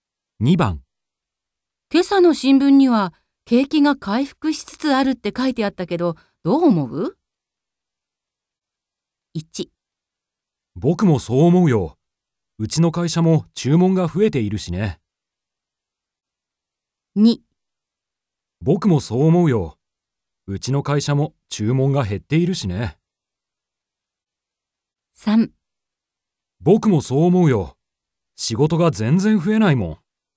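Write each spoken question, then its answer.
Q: 今朝の新聞には景気が回復しつつあるって書いてあったけど、どう思う ?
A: 1: 僕もそう思うよ。うちの会社も注文が増えているしね。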